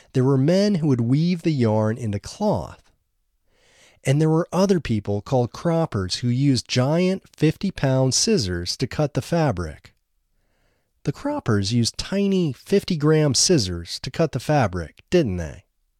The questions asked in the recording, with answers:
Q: The croppers used tiny 50-gram scissors to cut the fabric, didn't they?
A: No, the croppers didn't use tiny 50-gram scissors to cut the fabric.